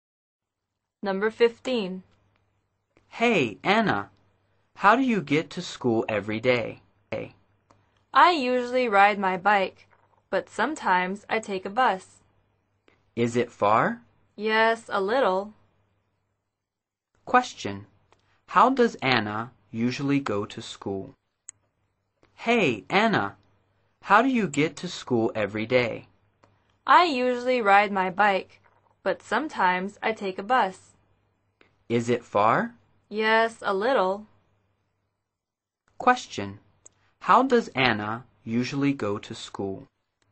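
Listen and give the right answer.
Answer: By bike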